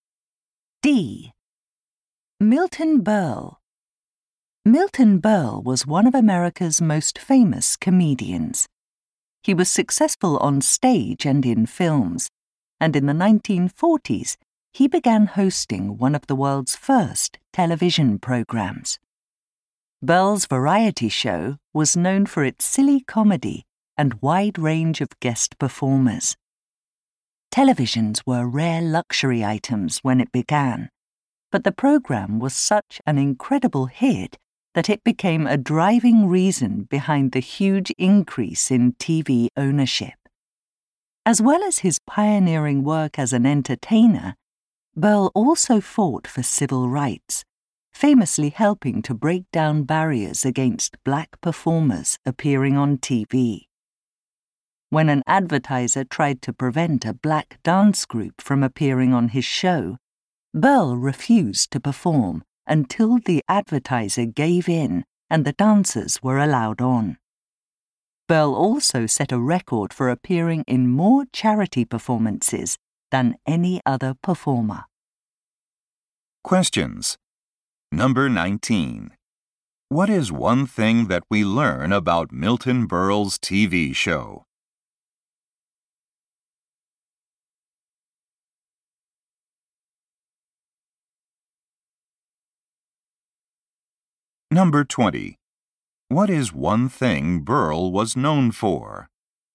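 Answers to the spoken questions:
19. It led to a huge increase in TV ownership
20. Fighting for civil rights for black performers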